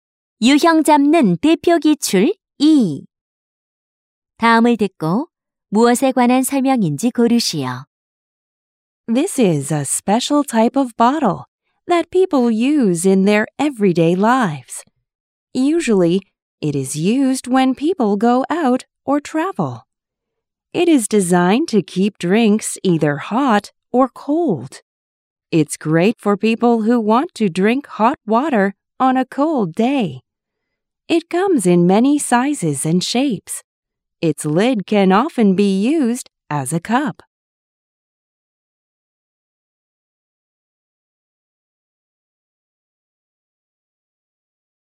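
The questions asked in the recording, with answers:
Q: 다음을 듣고 무엇에 관한 설명인지 고르시오.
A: 보온병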